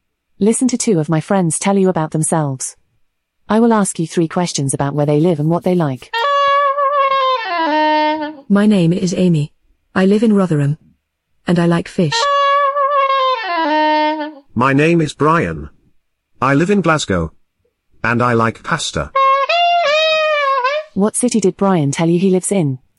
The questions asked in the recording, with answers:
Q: What city did Brian tell you he lives in?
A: Glasgow.